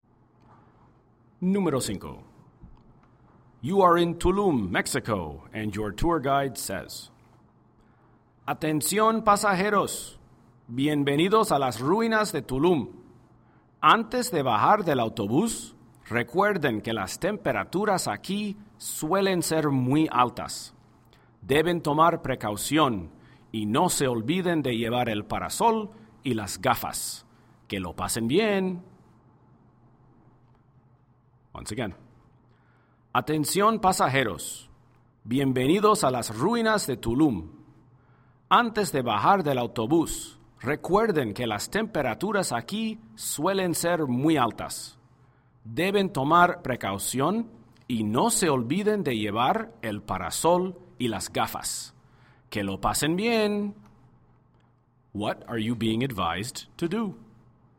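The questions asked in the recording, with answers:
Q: What are you being advised to do?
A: Protect yourself from the heat: bring a parasol and sunglasses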